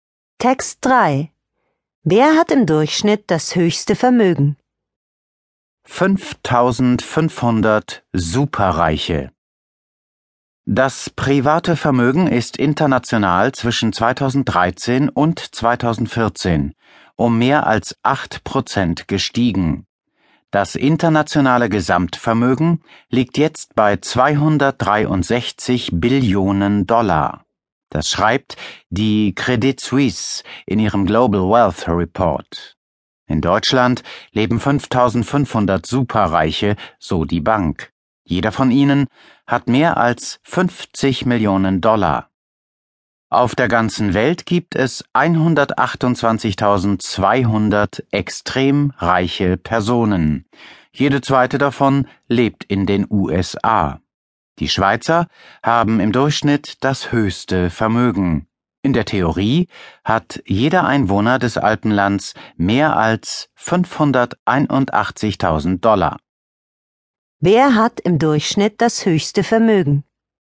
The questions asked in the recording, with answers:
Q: Wer hat im Durchschnitt das höchste Vermögen?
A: Die Schweizer.